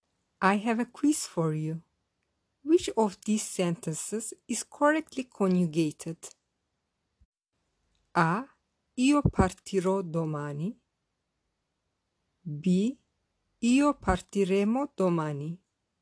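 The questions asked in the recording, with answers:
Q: Which of these sentences is correctly conjugated?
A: A: Io partirò domani.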